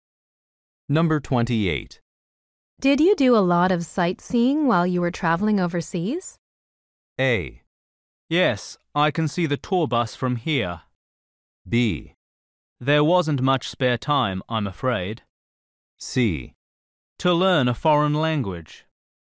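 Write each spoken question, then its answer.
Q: Did you do a lot of sightseeing while you were traveling overseas?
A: B: There wasn't much spare time, I'm afraid.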